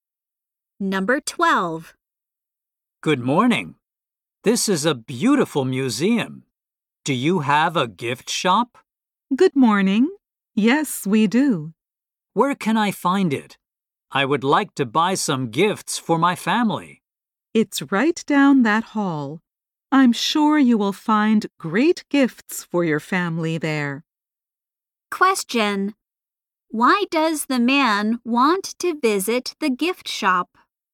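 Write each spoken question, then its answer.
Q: Why does the man want to visit the gift shop?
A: To buy gifts for his family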